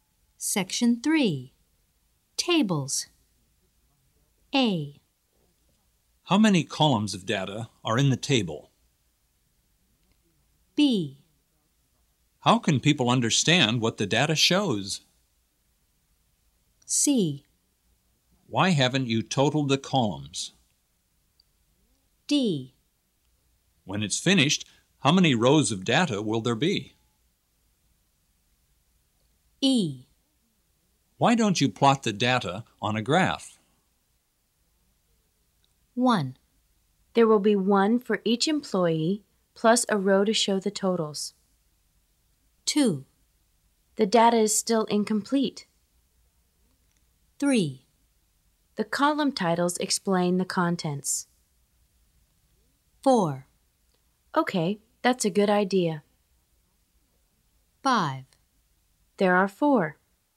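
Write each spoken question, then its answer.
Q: There will be one for each employee plus a row to show the totals.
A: D: When it's finished, how many rows of data will there be?

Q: The data is still incomplete.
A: C: Why haven't you totaled the columns?

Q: The column titles explain the contents.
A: B: How can people understand what the data shows?

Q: Okay, that's a good idea.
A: E: Why don't you plot the data on a graph?

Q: There are 4.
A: A: How many columns of data are in the table?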